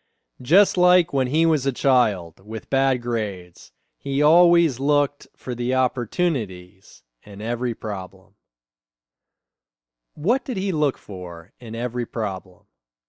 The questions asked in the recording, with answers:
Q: What did he look for in every problem?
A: He always looked for the opportunities in every problem.